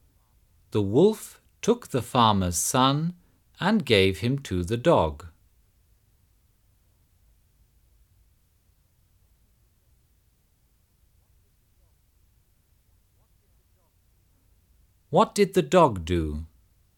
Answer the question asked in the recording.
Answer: The dog brought the little boy back to the farmer.